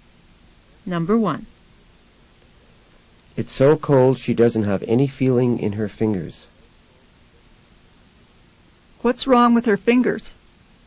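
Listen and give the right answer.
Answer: They have no feeling because of the cold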